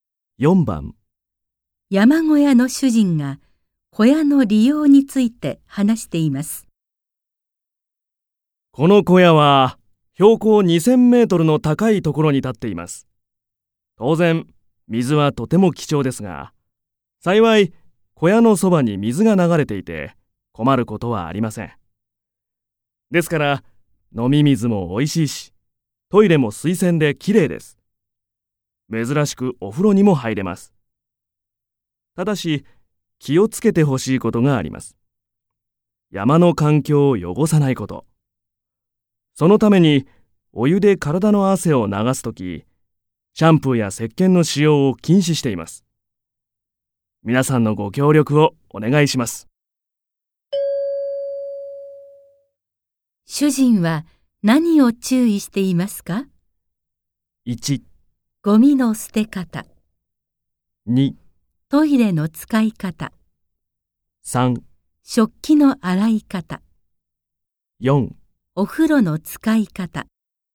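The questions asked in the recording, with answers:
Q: 主人は何を注意していますか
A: 4: お風呂の使い方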